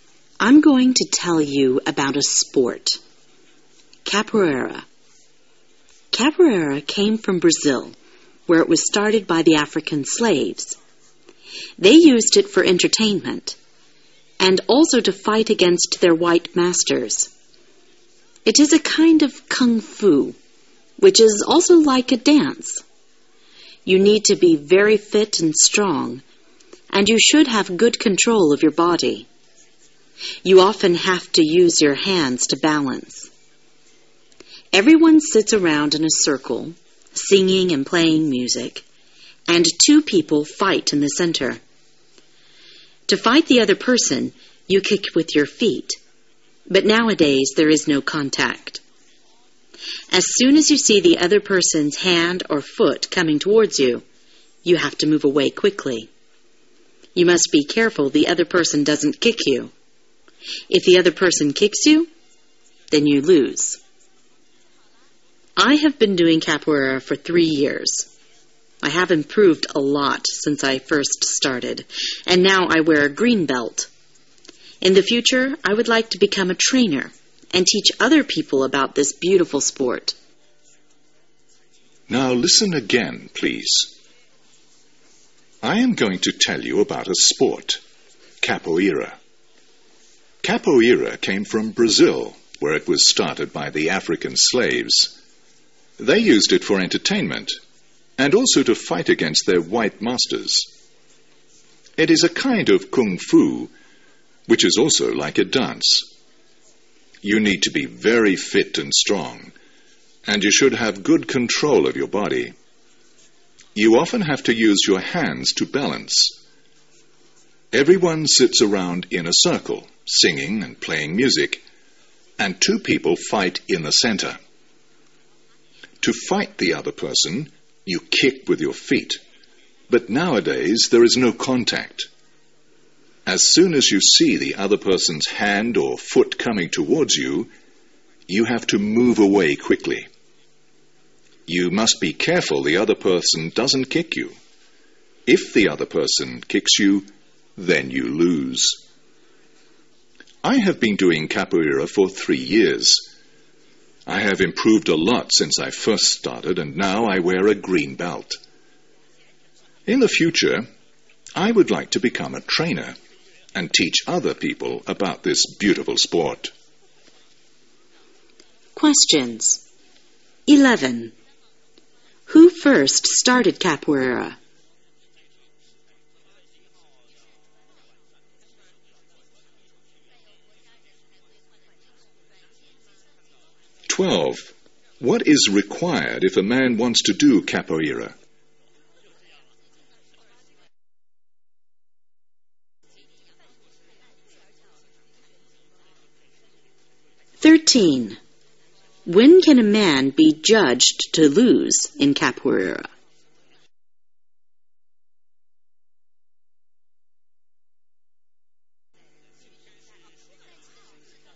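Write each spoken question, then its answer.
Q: Who first started capoeira?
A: African slaves in Brazil

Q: What is required if a man wants to do capoeira?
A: Being very fit and strong, with good control of the body

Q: When can a man be judged to lose in capoeira?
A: When the other person kicks him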